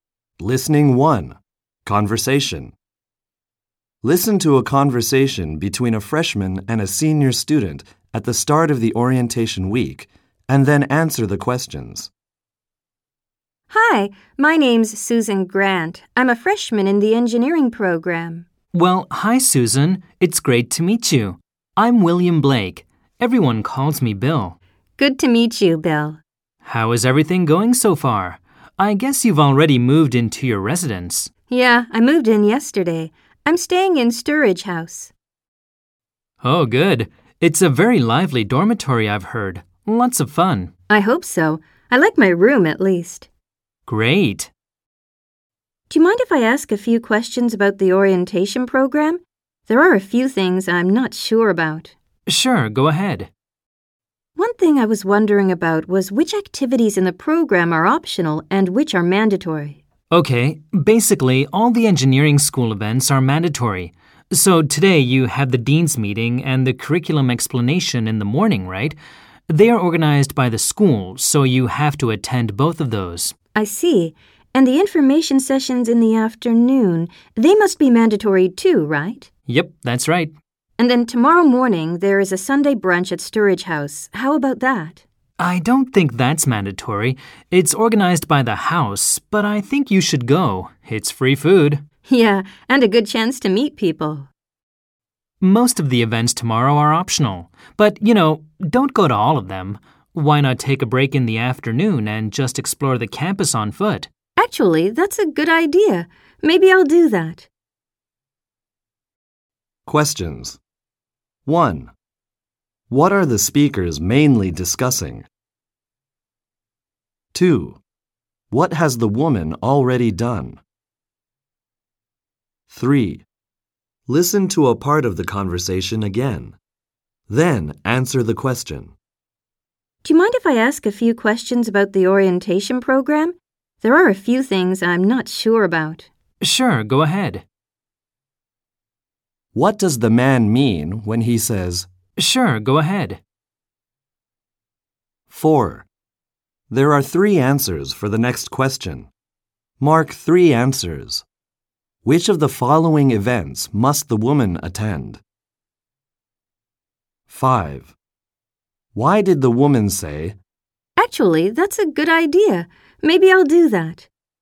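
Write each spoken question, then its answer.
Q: What are the speakers mainly discussing?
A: The orientation program activities, which are optional and which are mandatory

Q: What has the woman already done?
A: She has moved into her residence (Sturridge House)

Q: What does the man mean when he says,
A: He is happy to answer her questions

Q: Mark 3 answers. Which of the following events must the woman attend?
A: The dean's meeting, the curriculum explanation, and the information sessions

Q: Why did the woman say,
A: She agrees with his suggestion to take a break and explore the campus on foot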